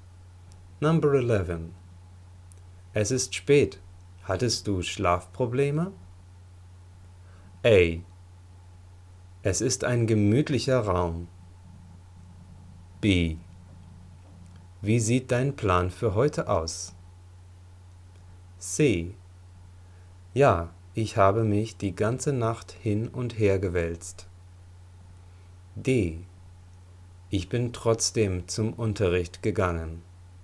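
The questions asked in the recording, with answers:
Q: Es ist spät. Hattest du Schlafprobleme?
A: C: Ja, ich habe mich die ganze Nacht hin und her gewälzt.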